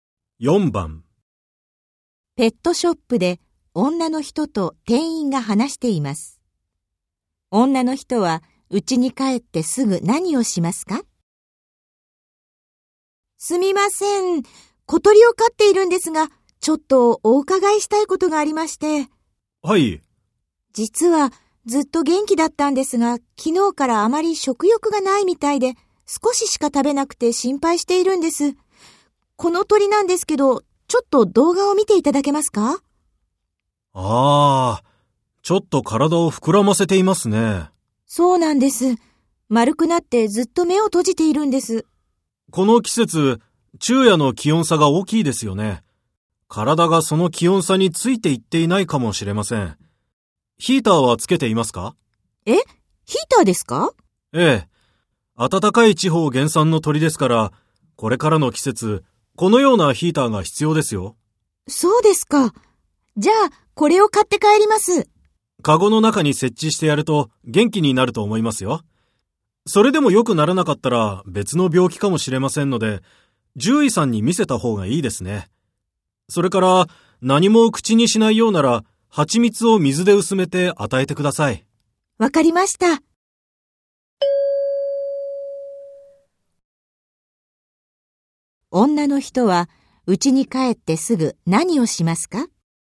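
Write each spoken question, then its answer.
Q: 女の人は、家に帰ってすぐ何をしますか?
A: 小鳥のカゴの中にヒーターを設置する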